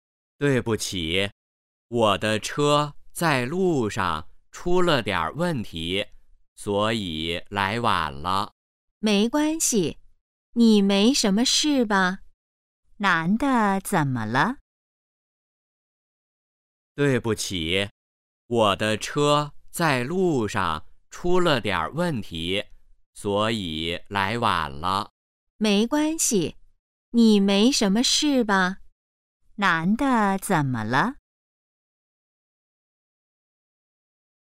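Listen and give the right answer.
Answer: 来晚了(车在路上出了问题)

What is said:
男:对不起,我的车在路上出了点儿问题,所以来晚了。
女:没关系,你没什么事吧?
问:男的怎么了?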